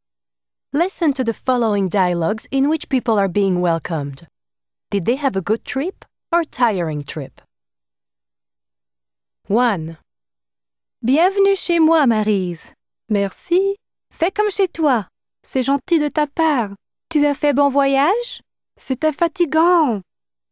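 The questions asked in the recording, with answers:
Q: Did they have a good trip or tiring trip?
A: tiring trip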